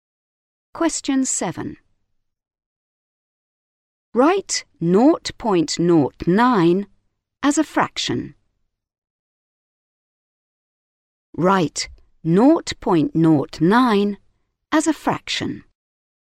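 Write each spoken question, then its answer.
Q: Write 0.09 as a fraction.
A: 9/100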